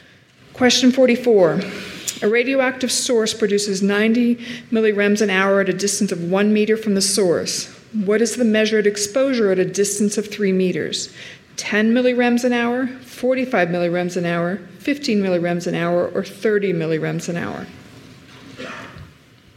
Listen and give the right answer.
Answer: A, 10 millirem per hour